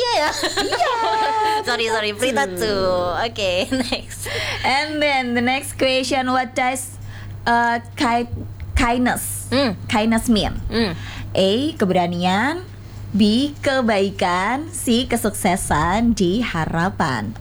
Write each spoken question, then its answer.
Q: What does kindness kindness mean?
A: Kebaikan. Yes.